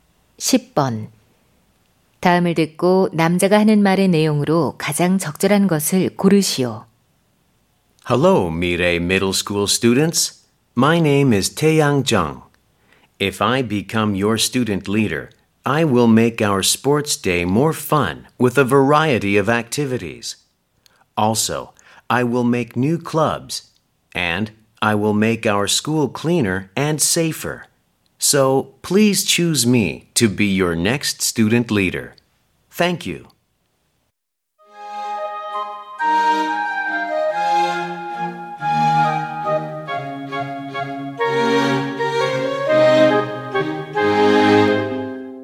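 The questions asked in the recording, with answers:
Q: 다음을 듣고 남자가 하는 말의 내용으로 가장 적절한 것을 고르시오.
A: 학생회장 선거 연설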